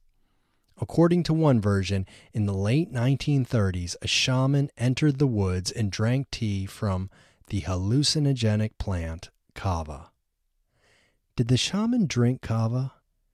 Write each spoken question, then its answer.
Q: Did the shaman drink kava?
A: Yes, the shaman drank kava.